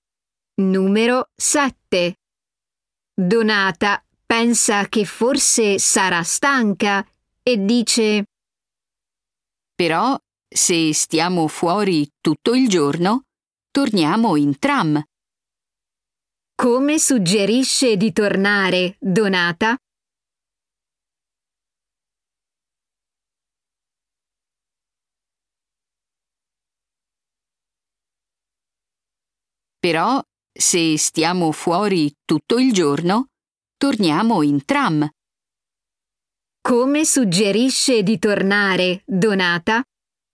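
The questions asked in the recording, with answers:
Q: Come suggerisce di tornare, Donata?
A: in tram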